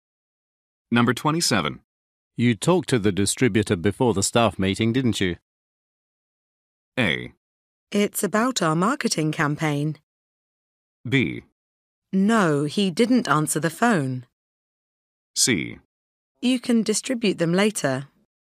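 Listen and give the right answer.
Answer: B: No, he didn't answer the phone.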